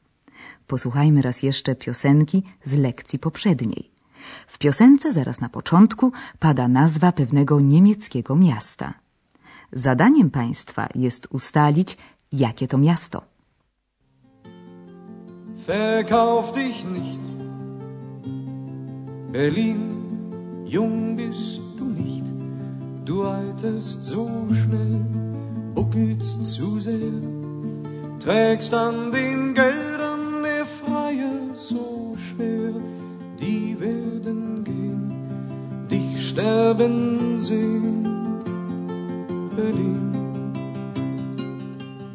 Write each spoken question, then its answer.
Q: Zadaniem Państwa jest ustalić, jakie to miasto.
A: I bez pomocy Andreasa odgadliby Państwo bez trudu, że miastem tym jest Berlin.